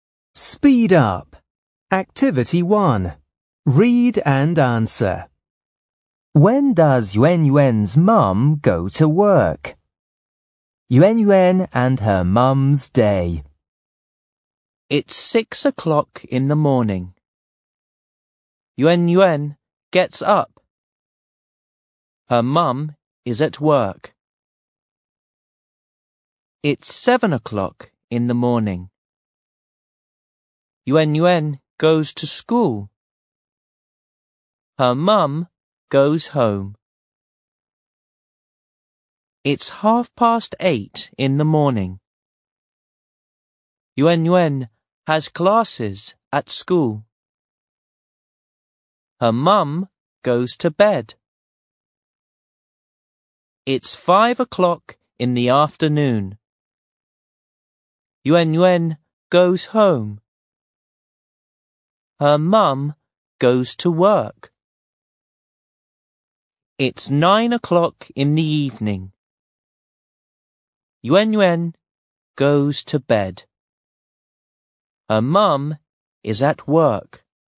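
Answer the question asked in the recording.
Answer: At 5 o'clock in the afternoon.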